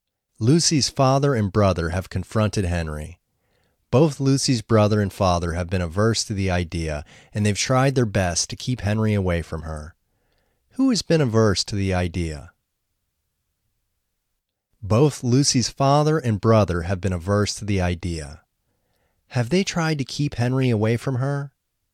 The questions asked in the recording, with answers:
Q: Have they tried to keep Henry away from her?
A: Yes, they've tried to keep Henry away from her.